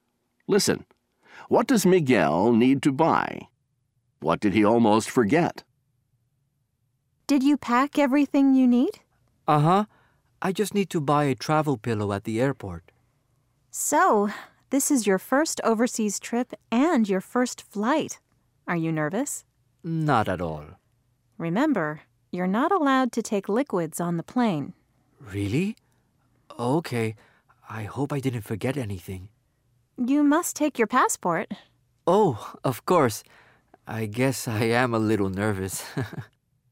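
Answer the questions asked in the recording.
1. A travel pillow
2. His passport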